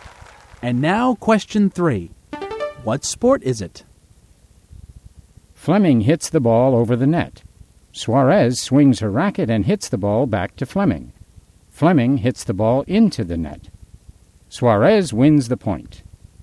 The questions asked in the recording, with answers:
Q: What sport is it?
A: I think it's tennis.